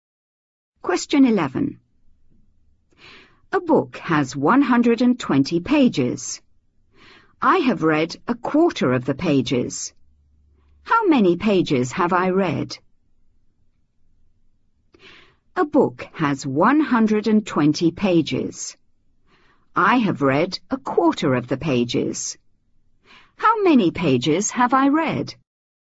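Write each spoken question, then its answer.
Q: How many pages have I read?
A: 30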